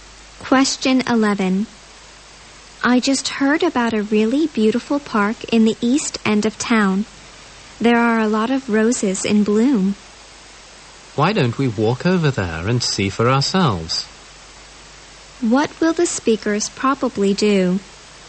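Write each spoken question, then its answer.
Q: What will the speakers probably do?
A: Walk to the park in the east end of town to see the roses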